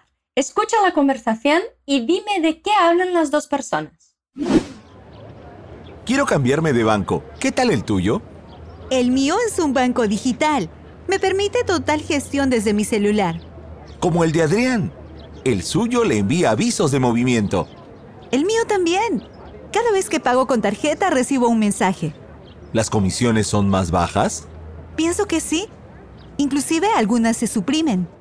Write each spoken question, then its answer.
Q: Escucha a conversação e dime de que hablan as duas pessoas.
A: A gente ouviu um homem e uma mulher conversando sobre bancos.